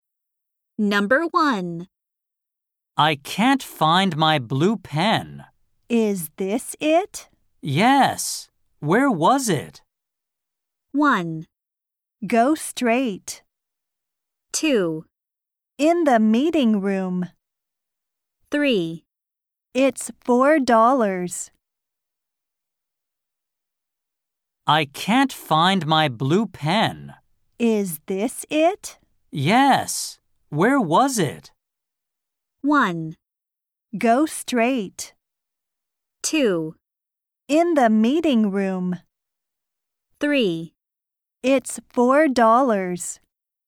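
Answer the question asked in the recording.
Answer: 2: In the meeting room.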